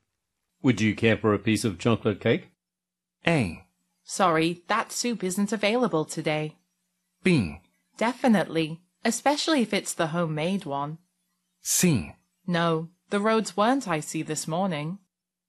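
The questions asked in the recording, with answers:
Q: Would you care for a piece of chocolate cake?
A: B: Definitely, especially if it's the homemade one.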